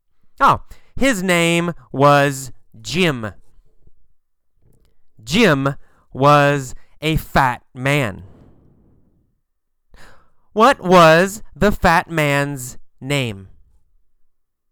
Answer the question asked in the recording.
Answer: Jim. The fat man's name was Jim.